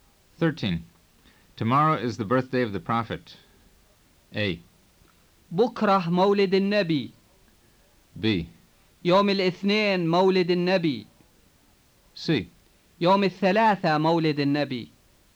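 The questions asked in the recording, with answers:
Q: Tomorrow is the birthday of the Prophet.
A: A: بكرة مولد النبي.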